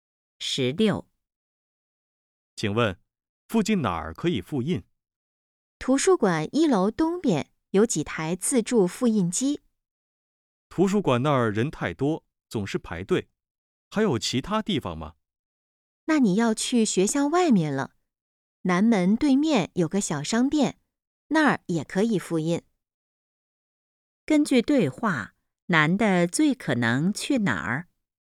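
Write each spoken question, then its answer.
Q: 根据对话,男的最可能去哪儿?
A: 南门对面的小商店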